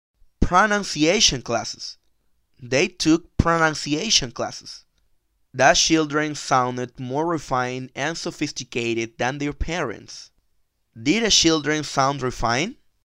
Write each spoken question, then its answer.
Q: Did the children sound refined?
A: Yes, they sounded refined.